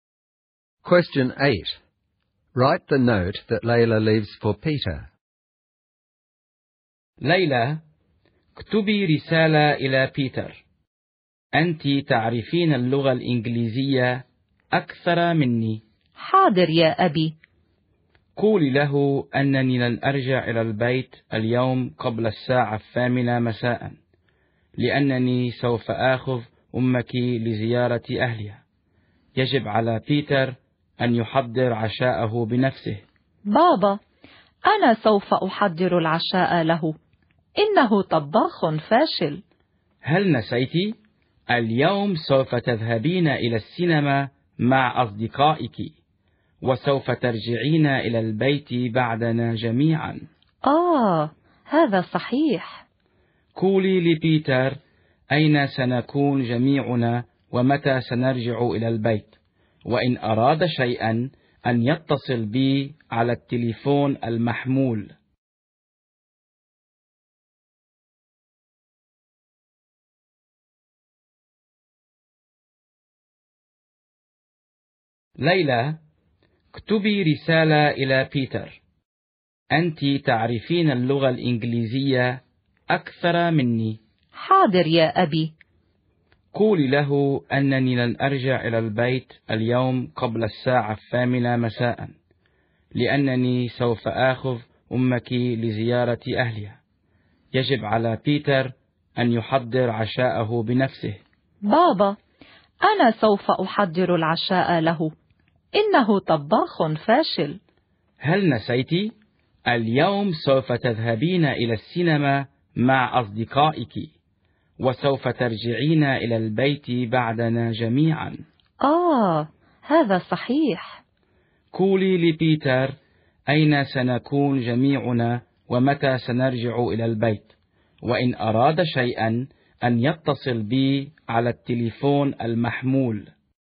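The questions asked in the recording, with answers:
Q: Write the note that Layla leaves for Peter.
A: Dad is taking Mum to visit her family and won't be home before 8 pm. Layla is at the cinema with friends and will be home after them. Peter must make his own dinner and can call Dad's mobile if he needs anything.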